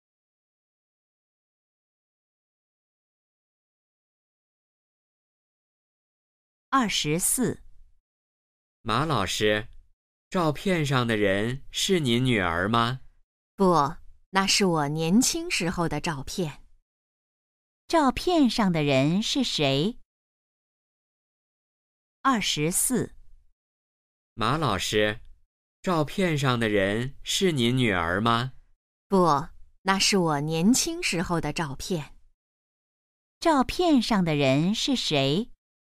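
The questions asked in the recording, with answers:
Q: 照片上的人是谁?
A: 马老师自己(年轻时)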